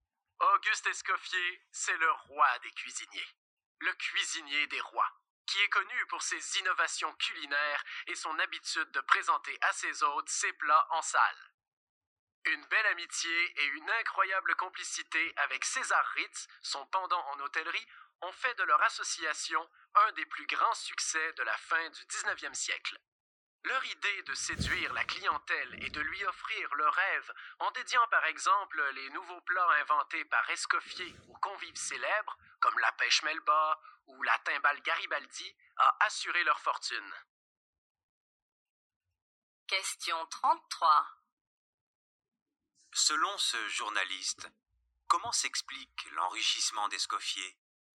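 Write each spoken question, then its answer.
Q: Selon ce journaliste, comment s'explique l'enrichissement d'Escoffier ?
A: Il a séduit la clientèle en dédiant ses nouveaux plats à des convives célèbres, en association avec César Ritz.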